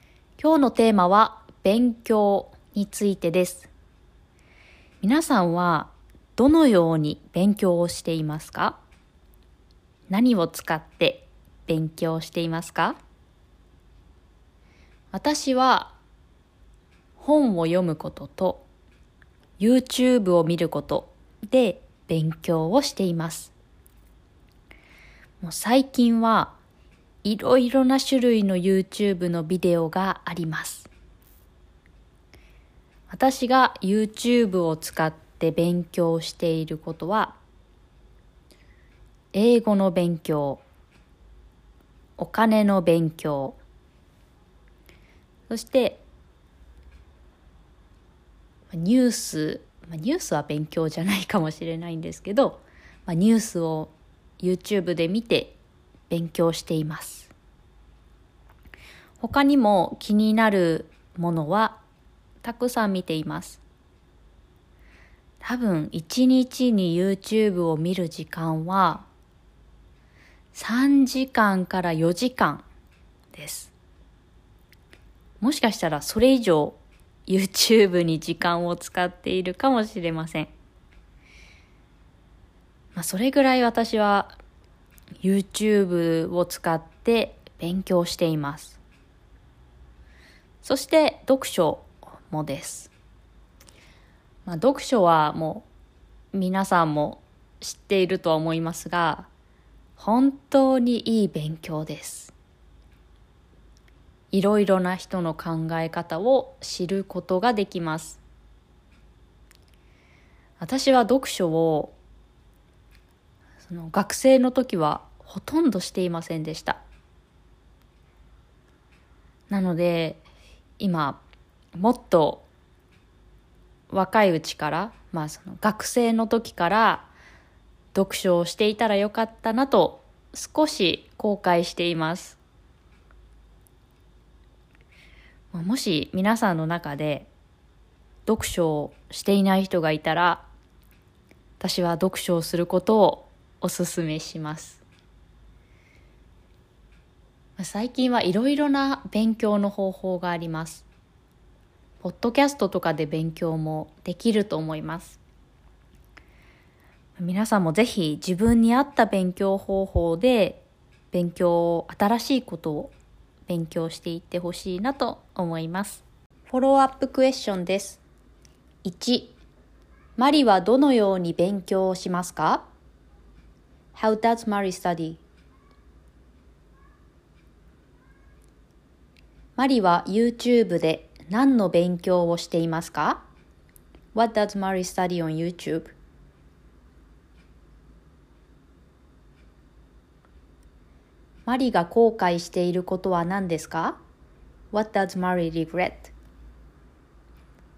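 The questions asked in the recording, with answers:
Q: マリはどのように勉強をしますか ?How does Mari study?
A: 本を読むことと YouTube を見ること

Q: マリは YouTube で何の勉強をしていますか ?What does Mari study on YouTube?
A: 英語、お金、ニュース

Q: マリが後悔していることは何ですか ?What does Mari regret?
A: 学生の時から読書をしていなかったこと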